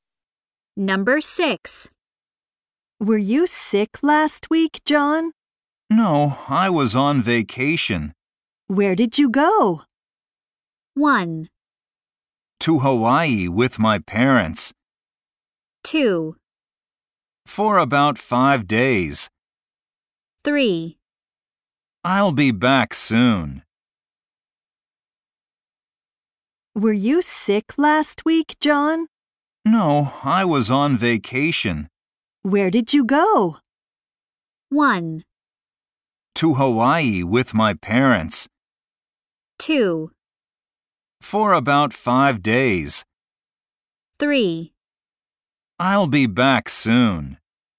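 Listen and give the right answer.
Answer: 1: To Hawaii with my parents.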